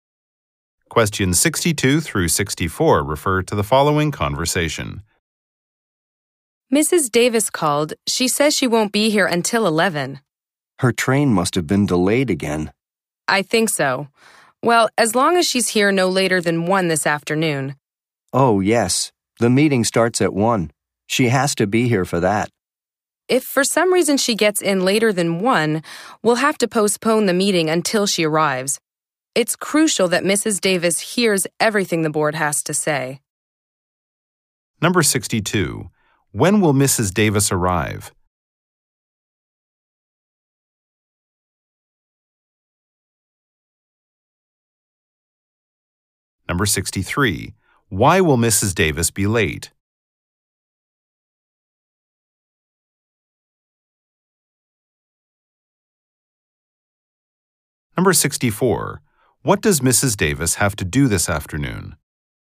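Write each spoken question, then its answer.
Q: Davis arrive?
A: At 11.

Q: Why will Mrs. Davis be late?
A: Her train was delayed.

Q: Davis have to do this afternoon?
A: Attend a meeting.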